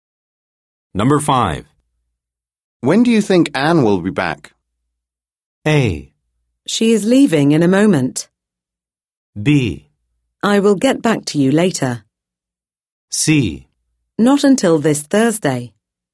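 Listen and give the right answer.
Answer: C: Not until this Thursday.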